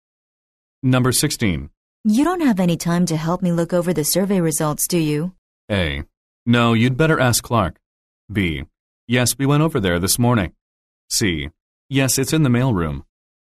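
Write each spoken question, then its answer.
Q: You don't have any time to help me look over the survey results, do you?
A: A: No, you'd better ask Clark.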